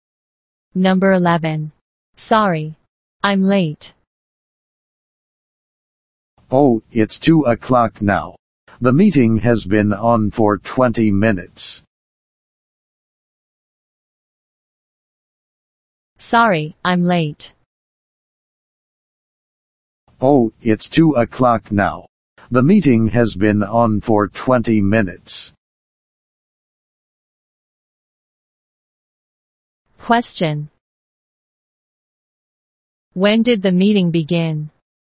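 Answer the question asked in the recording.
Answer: At 1:40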